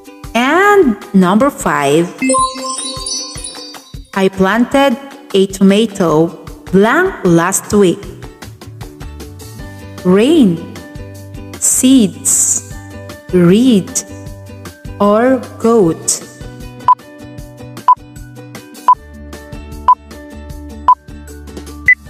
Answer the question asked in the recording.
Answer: The answer is seeds.